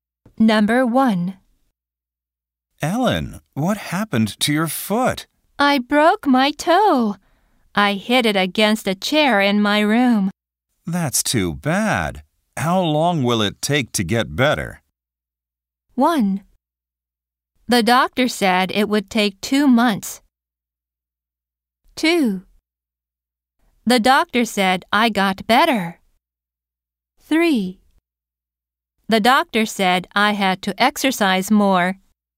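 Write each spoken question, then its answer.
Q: That's too bad. How long will it take to get better?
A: 1: The doctor said it would take 2 months.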